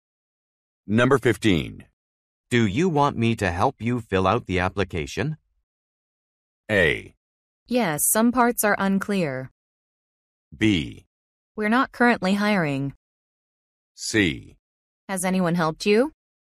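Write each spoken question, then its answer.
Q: Do you want me to help you fill out the application?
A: A: Yes, some parts are unclear.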